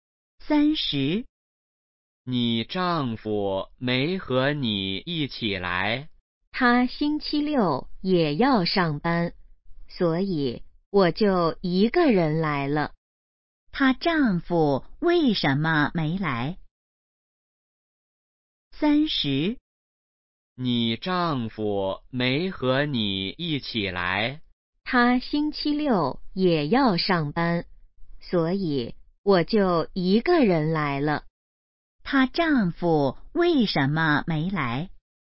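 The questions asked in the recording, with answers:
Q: 他丈夫为什么没来?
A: 星期六要上班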